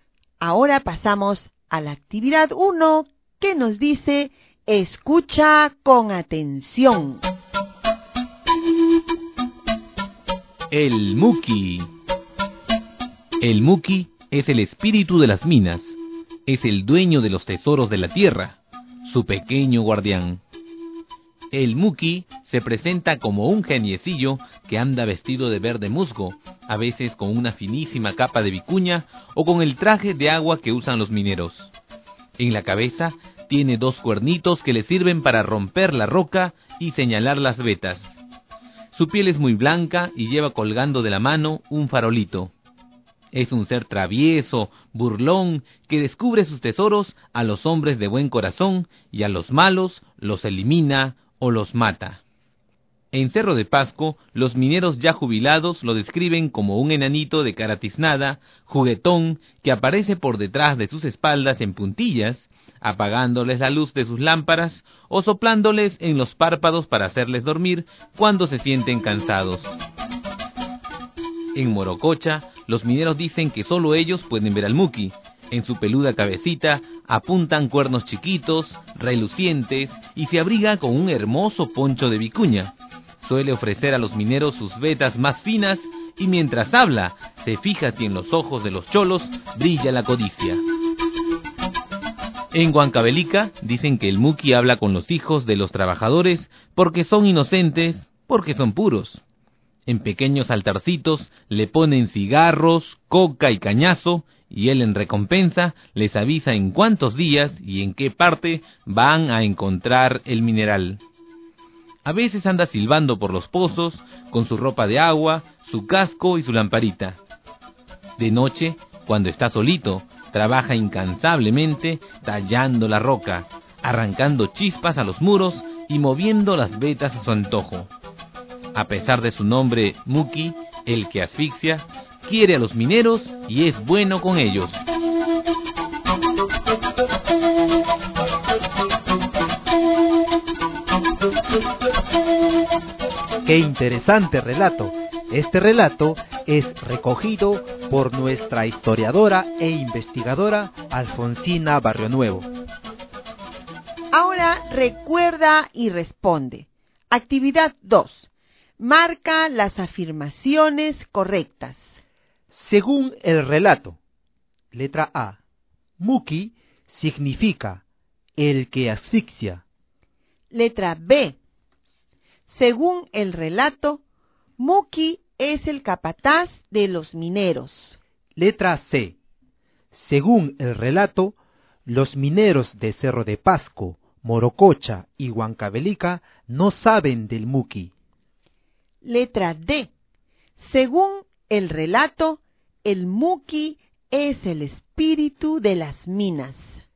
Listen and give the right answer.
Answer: Es decir, que la alternativa correcta es la letra A.